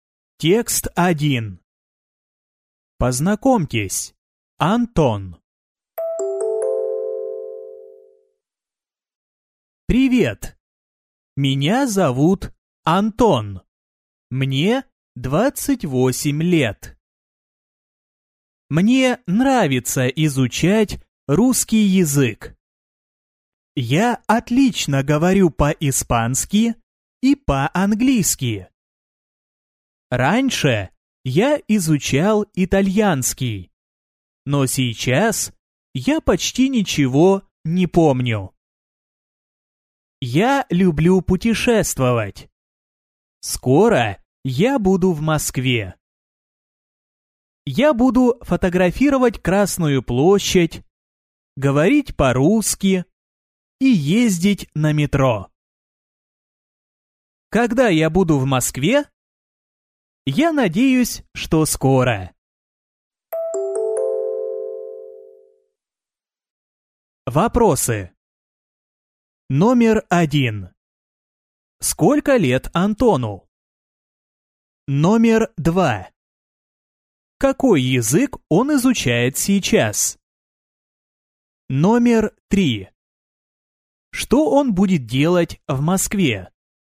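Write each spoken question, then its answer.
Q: Сколько лет Антону?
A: 28 лет

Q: Какой язык он изучает сейчас?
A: Русский язык

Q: Что он будет делать в Москве?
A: Фотографировать Красную площадь, говорить по-русски и ездить на метро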